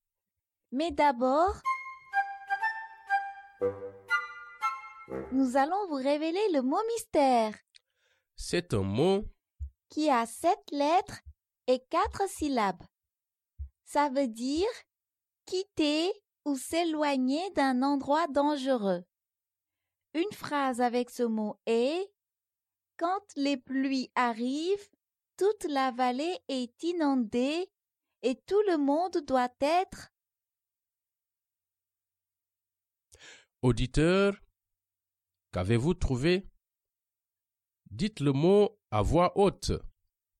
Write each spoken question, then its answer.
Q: Auditeur, qu'avez-vous trouvé?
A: Le mot mystère est évacué.